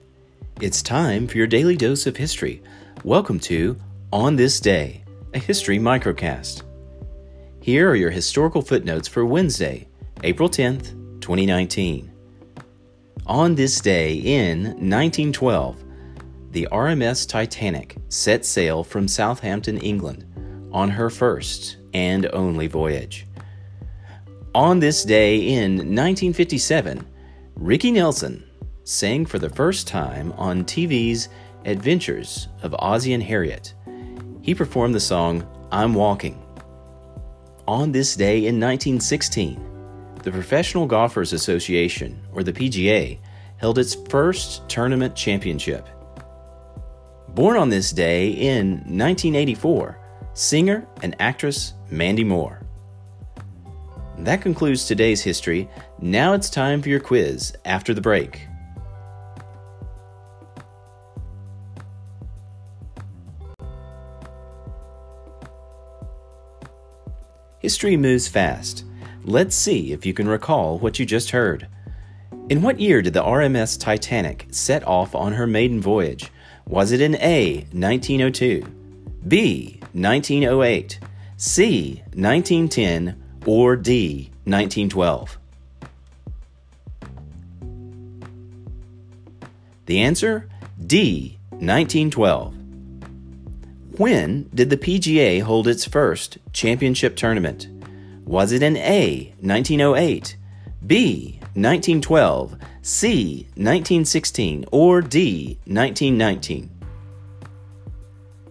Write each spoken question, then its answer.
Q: In what year did the RMS Titanic set off on her maiden voyage?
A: The answer, D, 1912.

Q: When did the PGA hold its first championship tournament?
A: The answer, C, 1916.